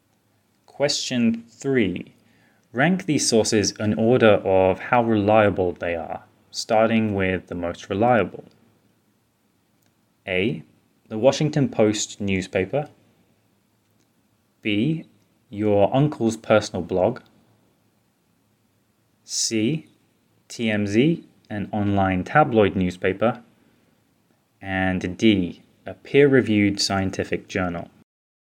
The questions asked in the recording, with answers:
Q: Rank these sources in order of how reliable they are, starting with the most reliable.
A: So our order from most reliable to least is D, a peer-reviewed scientific journal, A, the Washington Post, C, TMZ, an online tabloid newspaper, and B, your uncle's personal blog.